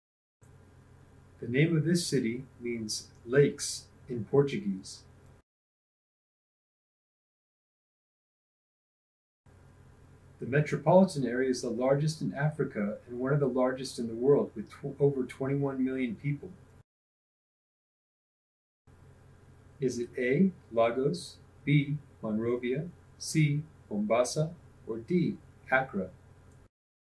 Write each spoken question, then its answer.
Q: Is it A, Lagos, B, Monrovia, C, Mombasa, or D, Accra?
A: If you chose Lagos, you're correct.